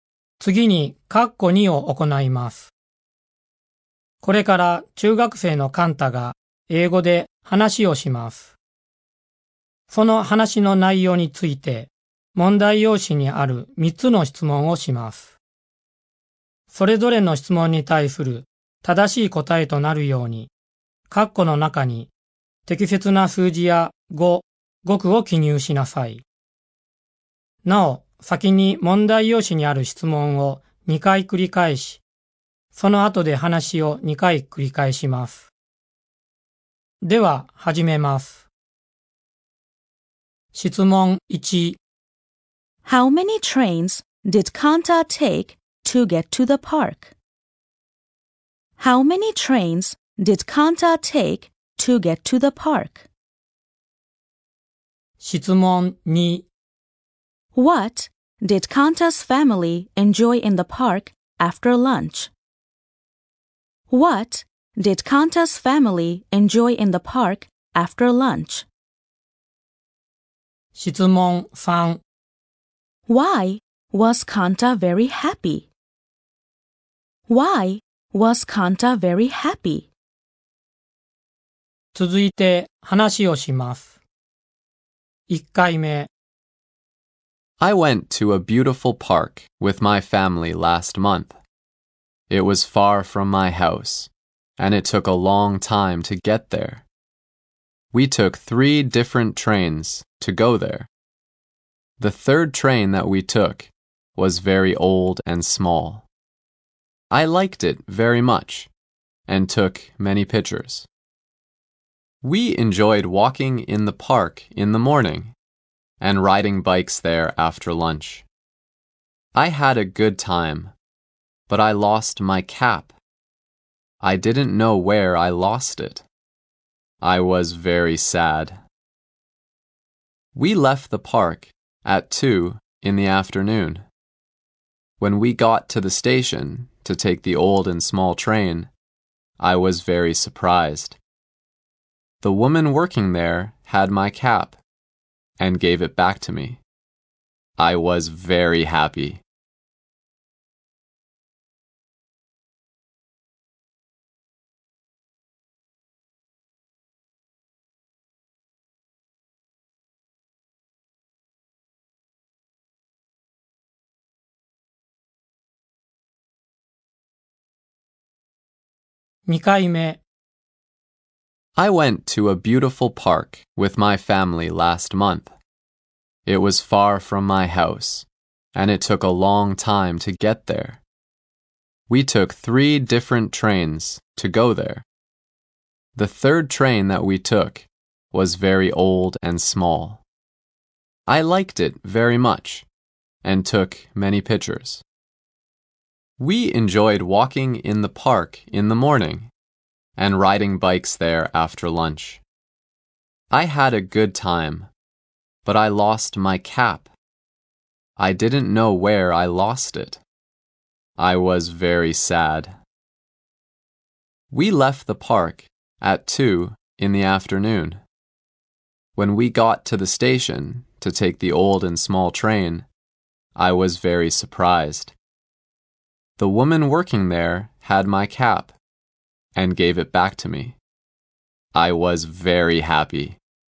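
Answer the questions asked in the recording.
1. Three.
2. Riding bikes.
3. Because the woman working at the station gave his cap back to him.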